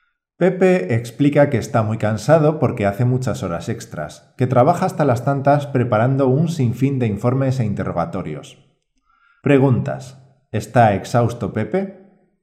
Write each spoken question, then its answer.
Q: ¿Está exhausto Pepe?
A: Sí, Pepe está exhausto, es decir, que está muy cansado.